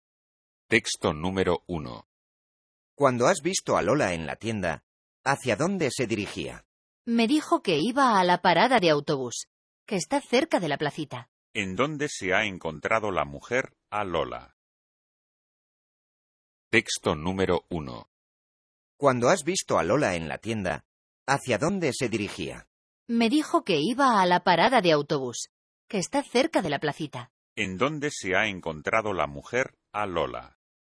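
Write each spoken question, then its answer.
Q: ¿En dónde se ha encontrado la mujer a Lola?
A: En la tienda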